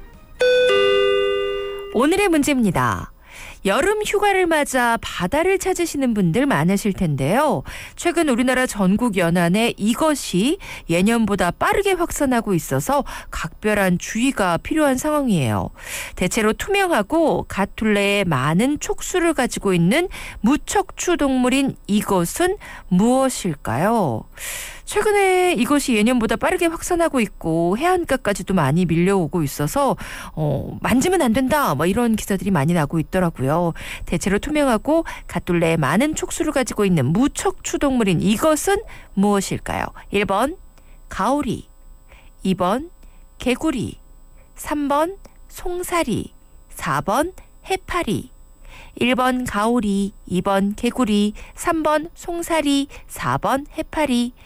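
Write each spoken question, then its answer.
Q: 대체로 투명하고 갓둘레에 많은 촉수를 가지고 있는 무척추 동물인 이것은 무엇일까요?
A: 4: 해파리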